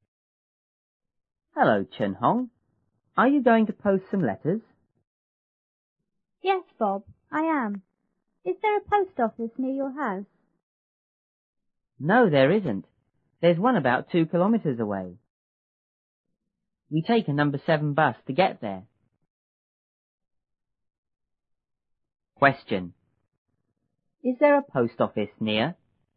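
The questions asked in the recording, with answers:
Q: Is there a post office near?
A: No, there isn't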